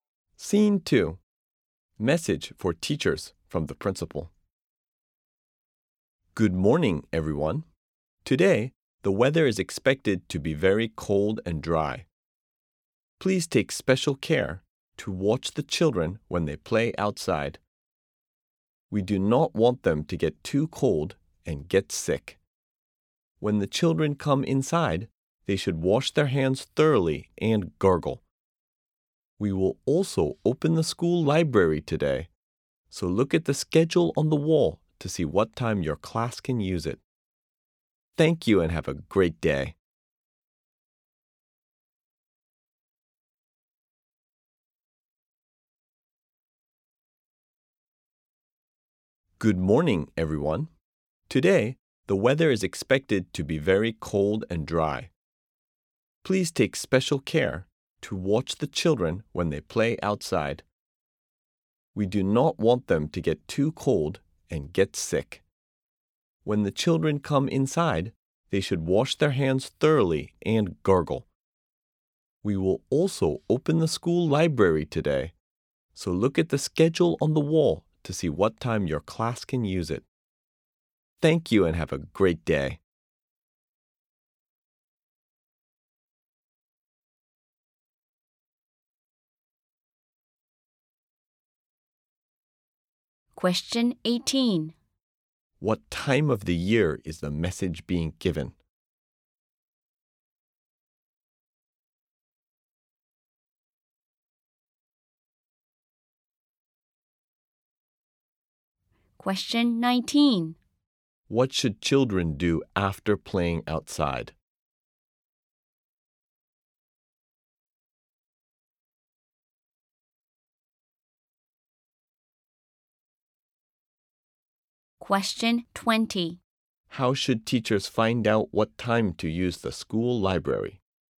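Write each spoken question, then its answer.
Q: What should children do after playing outside?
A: Wash their hands thoroughly and gargle

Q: How should teachers find out what time to use the school library?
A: Look at the schedule on the wall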